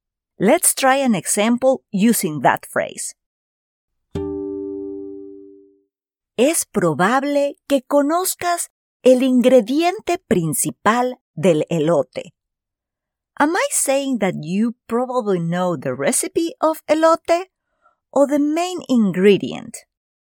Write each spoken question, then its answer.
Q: Am I saying that you probably know the recipe of elote or the main ingredient?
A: Correcto. You probably know the main ingredient.